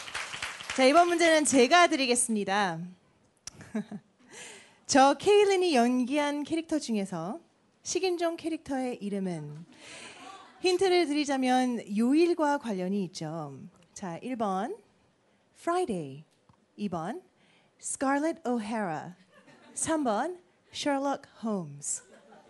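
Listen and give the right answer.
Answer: 1: Friday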